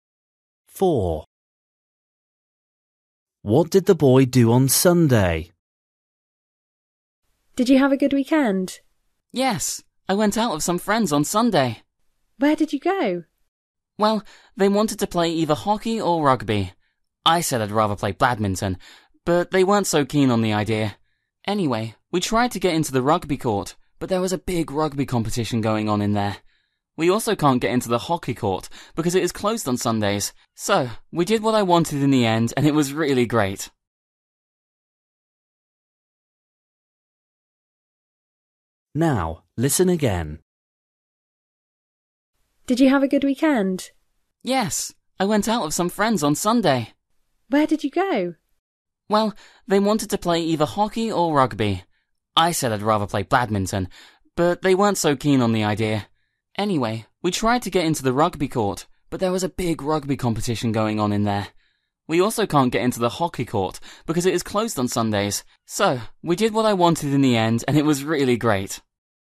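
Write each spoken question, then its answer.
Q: What did the boy do on Sunday?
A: played badminton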